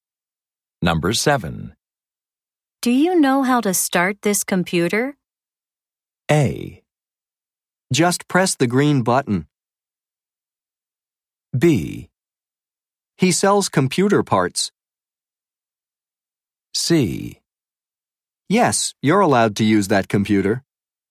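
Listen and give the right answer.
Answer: A: Just press the green button.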